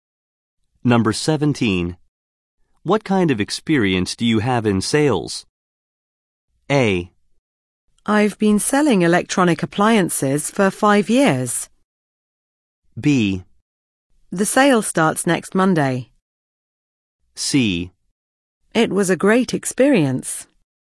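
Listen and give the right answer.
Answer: A: I've been selling electronic appliances for 5 years.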